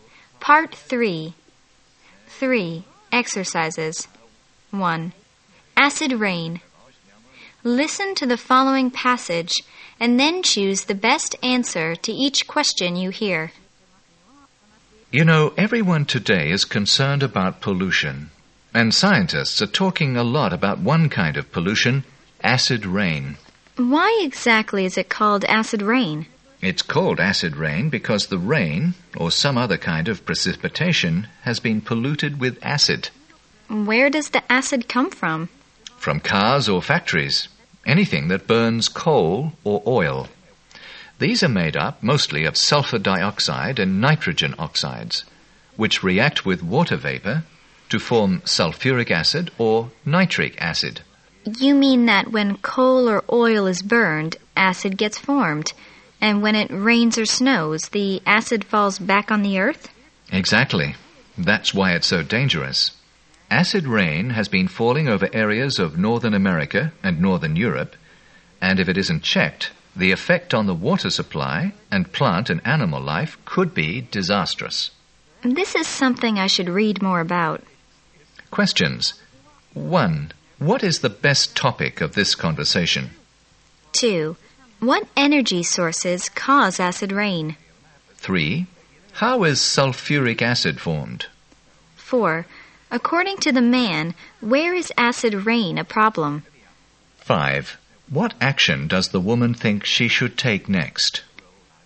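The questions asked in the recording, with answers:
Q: What is the best topic of this conversation?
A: Acid rain.

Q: What energy sources cause acid rain?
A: Coal and oil.

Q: How is sulfuric acid formed?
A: Sulfur dioxide reacts with water vapor.

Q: According to the man, where is acid rain a problem?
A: Northern America and Northern Europe.

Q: What action does the woman think she should take next?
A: Read more about it.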